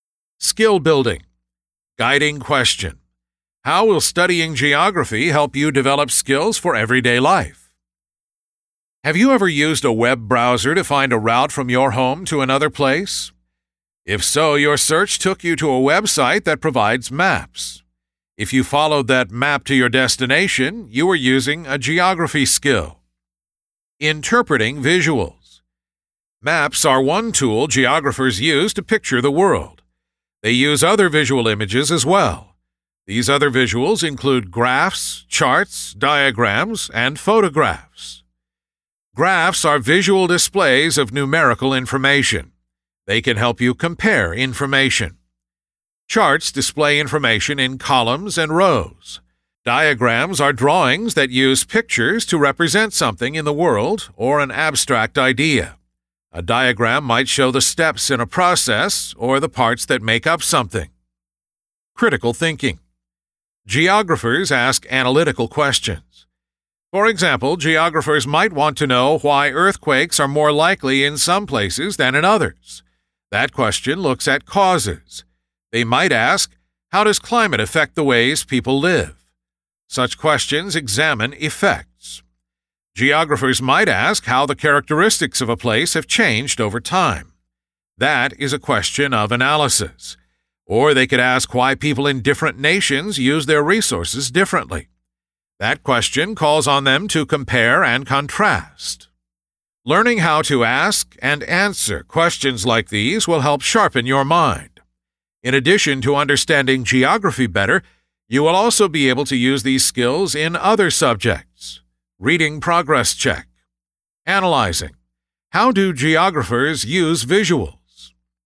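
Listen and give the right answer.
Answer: To picture the world and display information, e.g. maps, graphs, charts, diagrams and photographs that help compare information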